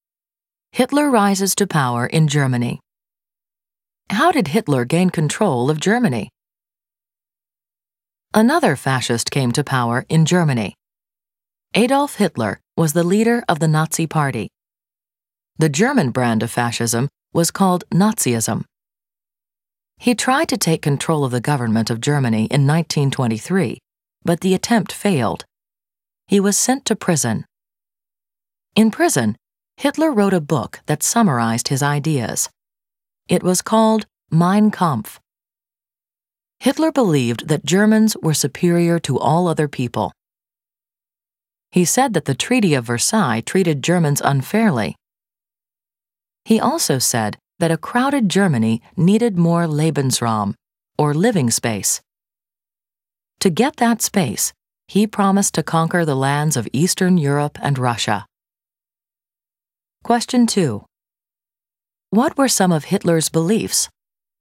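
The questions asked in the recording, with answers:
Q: What were some of Hitler's beliefs?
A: Germans were superior to other people, the Treaty of Versailles was unfair, and Germany needed more living space (Lebensraum)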